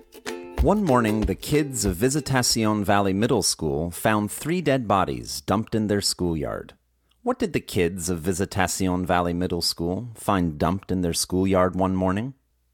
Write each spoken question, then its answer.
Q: What did the kids of Visitacion Valley Middle School find dumped in their schoolyard one morning?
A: One morning, the kids found three dead bodies dumped in their schoolyard.